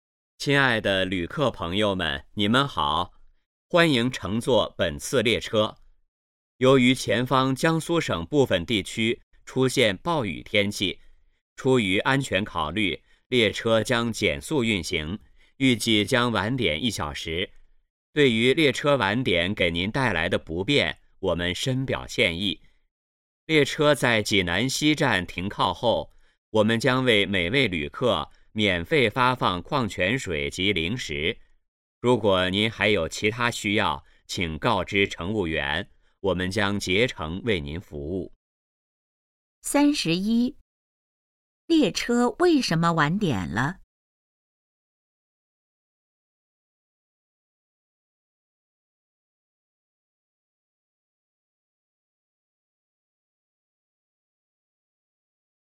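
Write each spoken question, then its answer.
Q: 列车为什么晚点了?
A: 前方部分地区出现暴雨,列车减速运行

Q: 列车停靠济南西站后会做什么?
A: 免费发放矿泉水及零食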